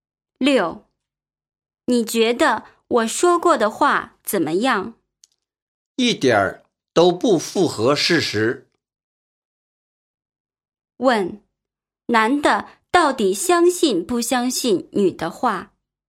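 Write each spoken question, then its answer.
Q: 问,男的到底相信不相信女的话?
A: 不相信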